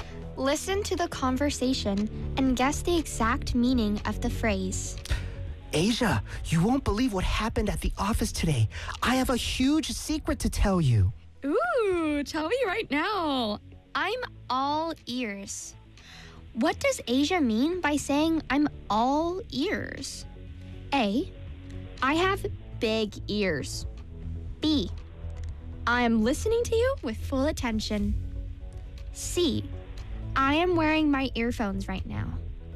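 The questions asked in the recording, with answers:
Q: What does Asia mean by saying I'm all ears?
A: B: I am listening to you with full attention.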